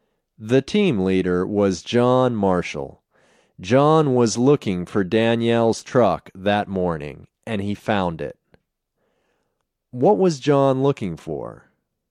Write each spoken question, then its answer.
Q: What was John looking for?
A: John was looking for Danielle's truck.